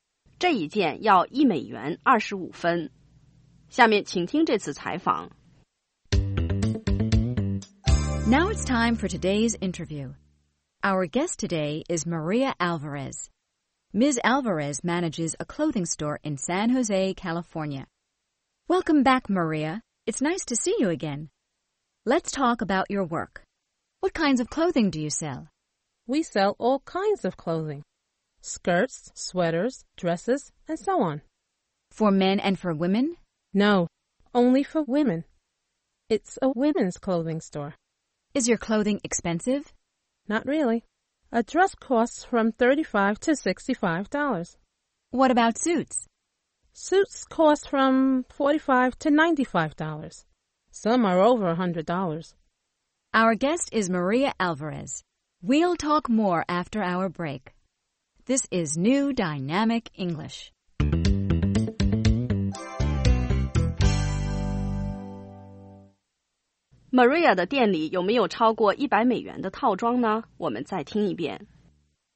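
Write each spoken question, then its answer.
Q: Maria 的店里有没有超过$100的套装呢?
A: 有,有些套装超过$100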